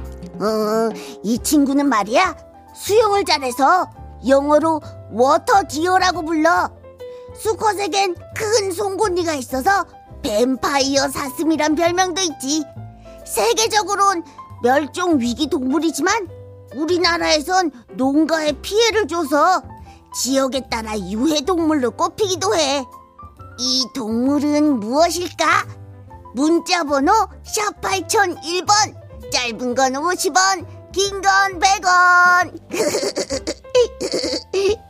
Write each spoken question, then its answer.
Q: 이 동물은 무엇일까?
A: 고라니지요.